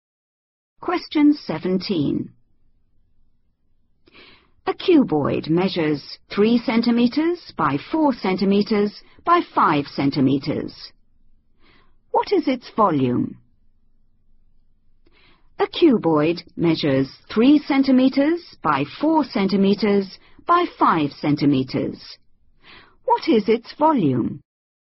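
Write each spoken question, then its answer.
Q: What is its volume?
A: 60 cubic centimetres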